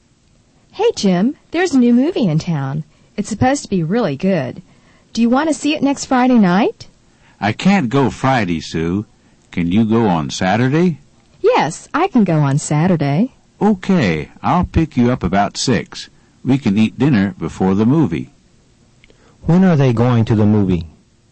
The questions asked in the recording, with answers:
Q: When are they going to the movie?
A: They're going to the movie on Saturday.